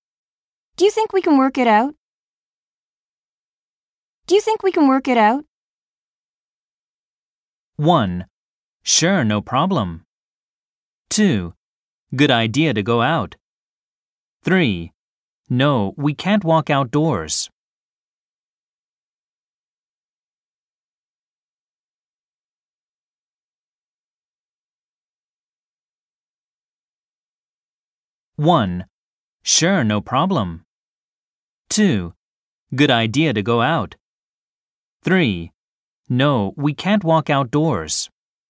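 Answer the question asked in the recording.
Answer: 1: Sure, no problem.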